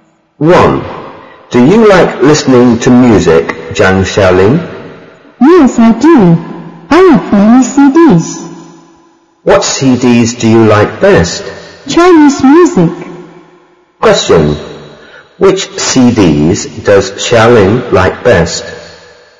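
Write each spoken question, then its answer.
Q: Which CDs does Xiaoling like best?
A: Chinese music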